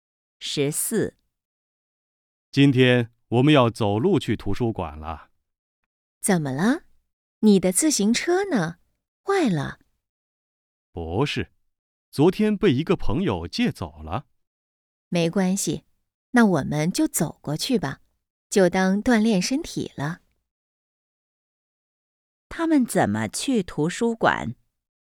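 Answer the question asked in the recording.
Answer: 走路去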